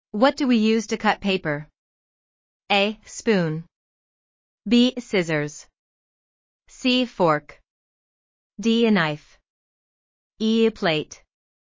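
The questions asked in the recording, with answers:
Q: What do we use to cut paper?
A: B: Scissors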